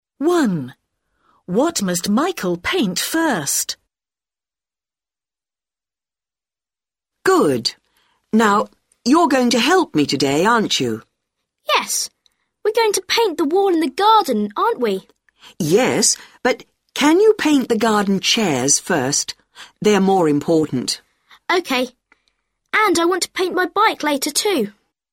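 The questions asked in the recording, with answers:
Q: What must Michael paint first?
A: the garden chairs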